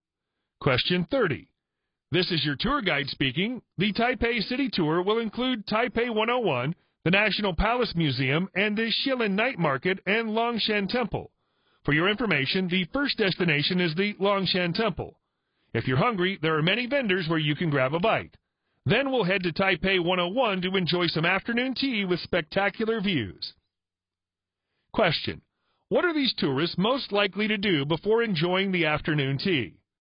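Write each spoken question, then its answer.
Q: What are these tourists most likely to do before enjoying the afternoon tea?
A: Visit Longshan Temple (and grab a bite from vendors there)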